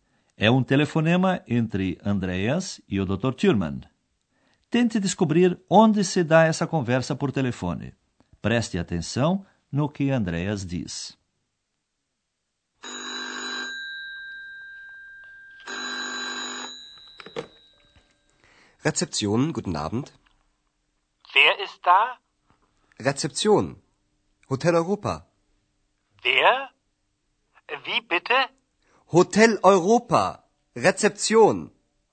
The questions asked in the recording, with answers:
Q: Tente descobrir onde se dá essa conversa por telefone.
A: A ação do nosso curso transcorre, portanto, no Hotel Europa.